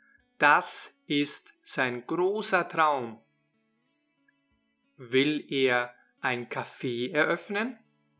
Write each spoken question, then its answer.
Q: Will er ein Café eröffnen?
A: Ja, das will er.